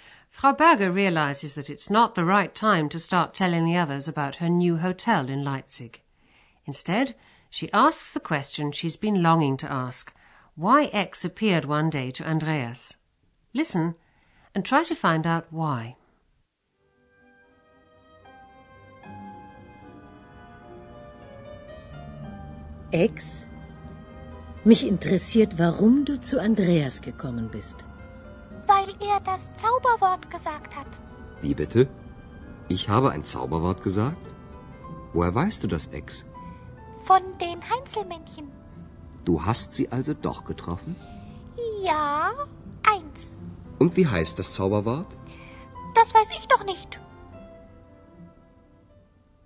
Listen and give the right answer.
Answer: X suddenly appeared because Andreas said the magic word.